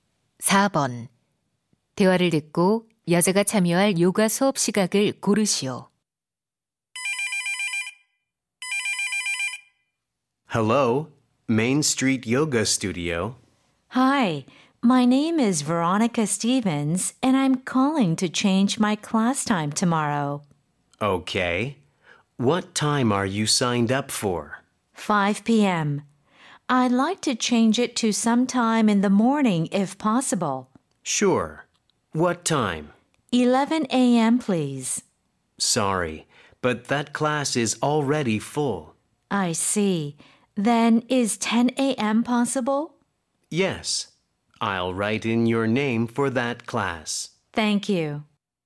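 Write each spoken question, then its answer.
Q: 대화를 듣고 여자가 참여할 요가 수업 시각을 고르시오.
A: 오전 10시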